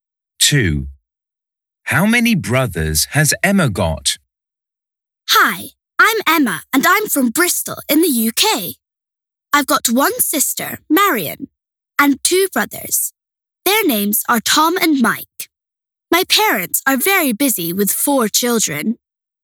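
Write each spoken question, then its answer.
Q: How many brothers has Emma got?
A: two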